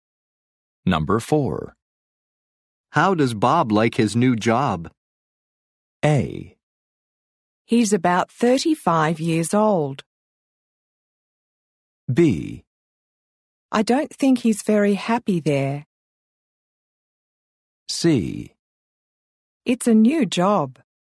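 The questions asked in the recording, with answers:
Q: How does Bob like his new job?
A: B: I don't think he's very happy there.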